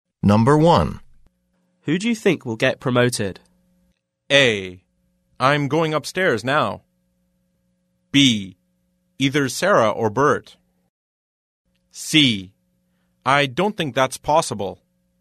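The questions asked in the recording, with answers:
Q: Who do you think will get promoted?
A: B: Either Sarah or Bert.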